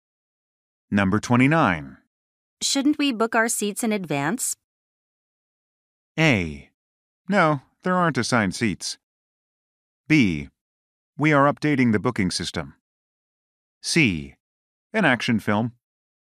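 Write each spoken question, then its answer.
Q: Shouldn't we book our seats in advance?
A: A: No, there aren't assigned seats.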